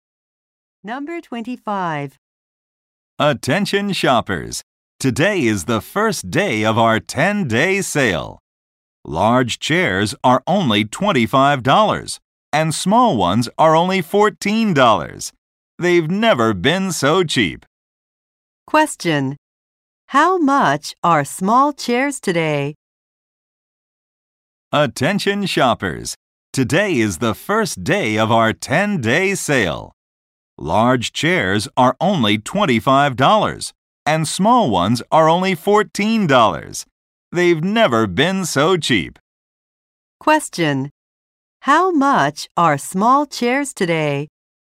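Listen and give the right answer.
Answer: $14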